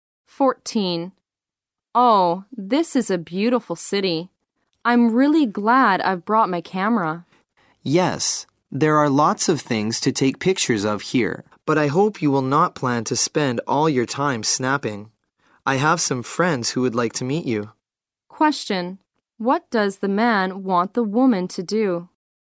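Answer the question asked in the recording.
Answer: Not spend all her time taking pictures, and meet his friends.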